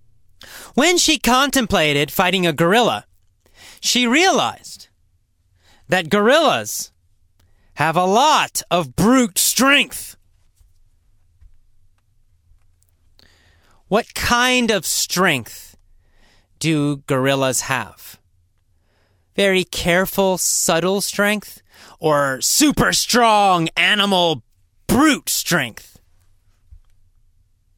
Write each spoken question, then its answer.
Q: What kind of strength do gorillas have?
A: Well, they have brute strength.